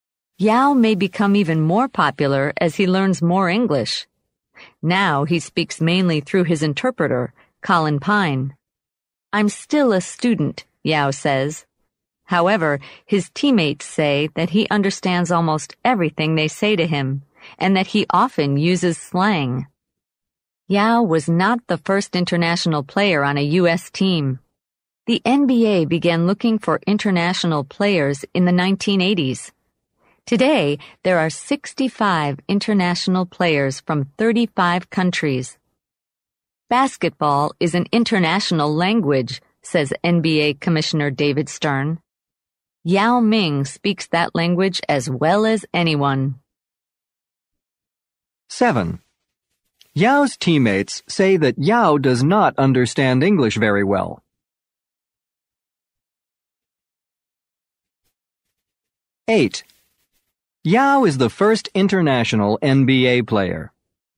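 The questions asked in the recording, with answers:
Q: Yao's teammates say that Yao does not understand English very well.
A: False

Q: Yao is the first international NBA player.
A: False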